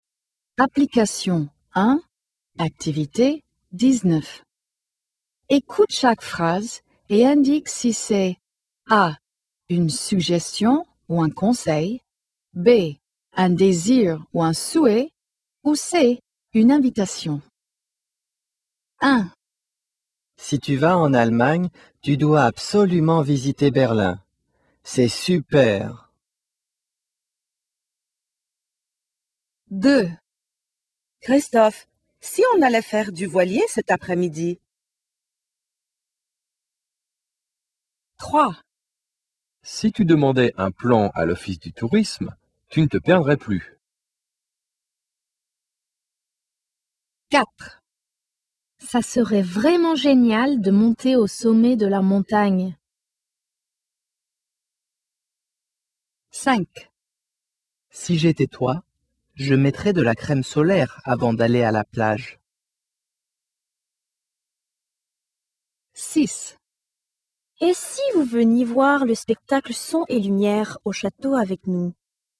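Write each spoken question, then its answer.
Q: Si tu vas en Allemagne, tu dois absolument visiter Berlin. C'est super.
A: A: une suggestion ou un conseil

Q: Si tu demandais un plan à l'office du tourisme, tu ne te perdrais plus.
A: A: une suggestion ou un conseil

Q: Ça serait vraiment génial de monter au sommet de la montagne.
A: B: un désir ou un souhait

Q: Si j'étais toi, je mettrais de la crème solaire avant d'aller à la plage.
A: A: une suggestion ou un conseil

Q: Et si vous veniez voir le spectacle Son et Lumière au château avec nous ?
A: C: une invitation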